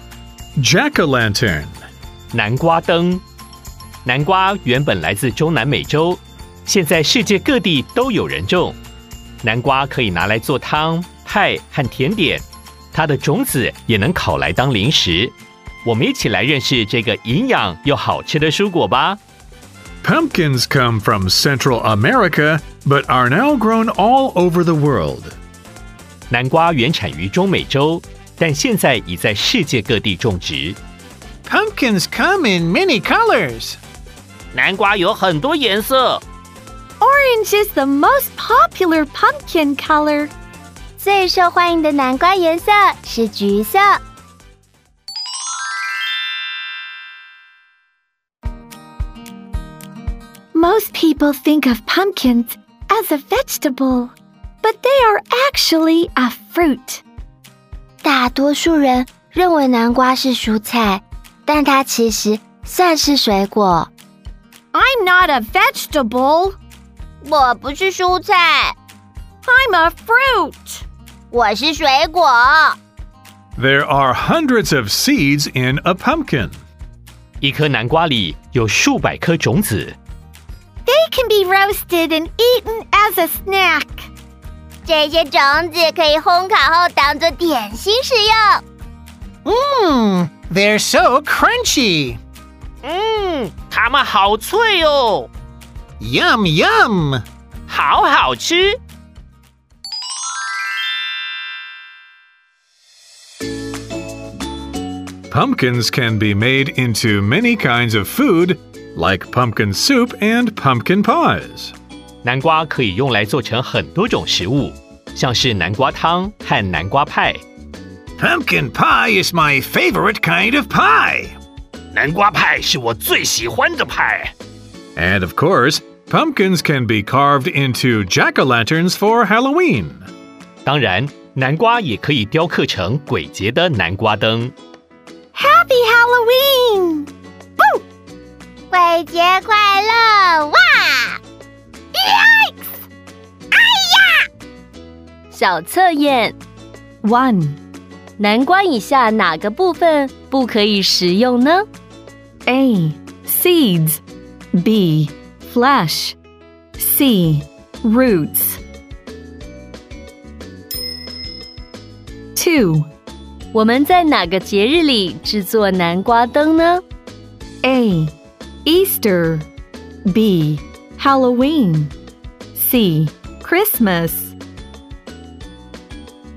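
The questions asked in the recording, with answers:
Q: 我们在哪个节日里制作南瓜灯呢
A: B: Halloween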